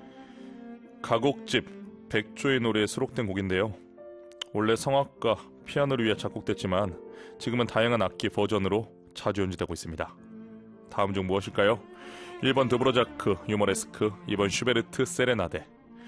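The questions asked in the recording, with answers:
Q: 다음 중 무엇일까요? 1번 드브로자크, 유머레스크, 2번 슈베르트 세레나데.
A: 2번: 슈베르트 세레나데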